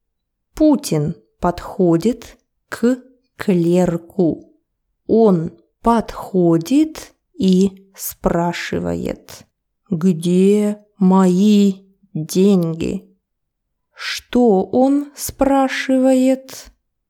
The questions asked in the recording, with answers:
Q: Что он спрашивает?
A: Он спрашивает, где мои деньги?